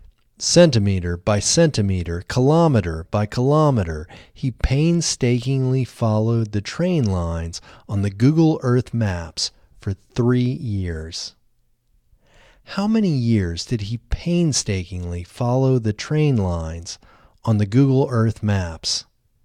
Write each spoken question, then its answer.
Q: How many years did he painstakingly follow the train lines on the Google Earth maps?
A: He painstakingly followed the train lines on the Google Earth maps for 3 years.